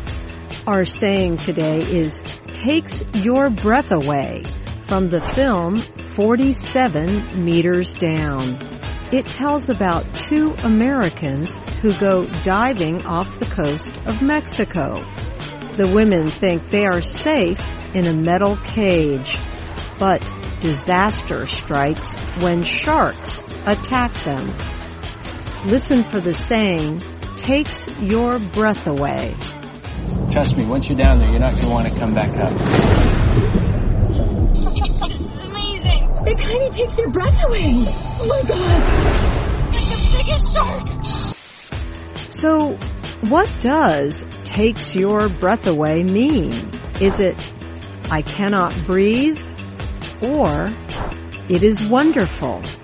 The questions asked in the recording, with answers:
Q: So what does takes your breath away mean? Is it, I cannot breathe? Or, it is wonderful?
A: Takes your breath away means it is wonderful.